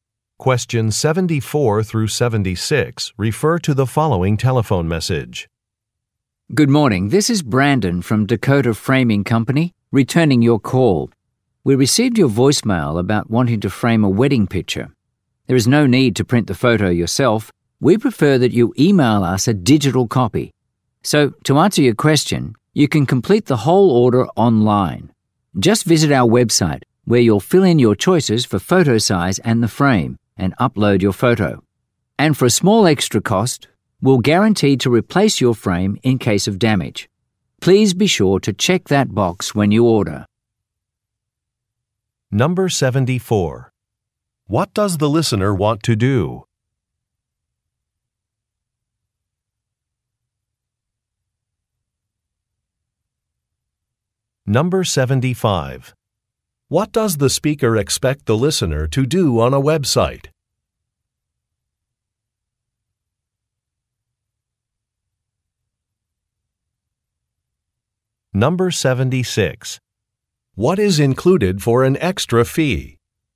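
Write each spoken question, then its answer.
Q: What does the listener want to do?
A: Frame a wedding picture

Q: What does the speaker expect the listener to do on a website?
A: Complete the order, choose size and frame, and upload the photo

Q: What is included for an extra fee?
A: A guaranteed replacement of the frame if damaged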